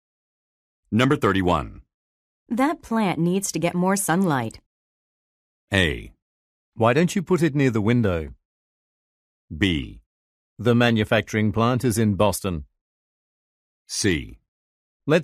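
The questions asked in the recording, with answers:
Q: That plant needs to get more sunlight.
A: A: Why don't you put it near the window?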